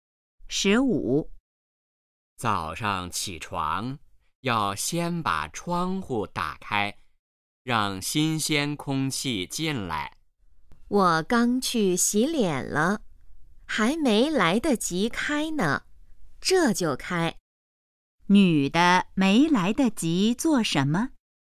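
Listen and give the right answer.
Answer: 开窗户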